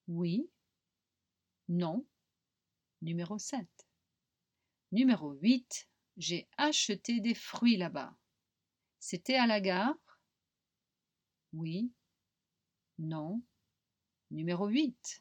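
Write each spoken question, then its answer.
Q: C'était à la gare?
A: Non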